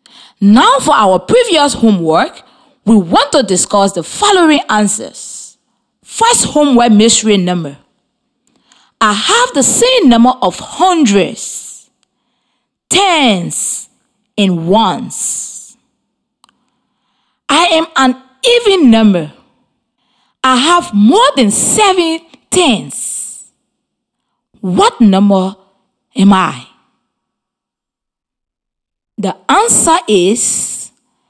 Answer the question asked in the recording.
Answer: 888.